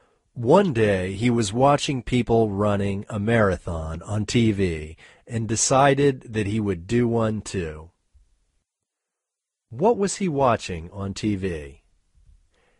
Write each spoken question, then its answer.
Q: What was he watching on TV?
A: He was watching people on TV running a marathon.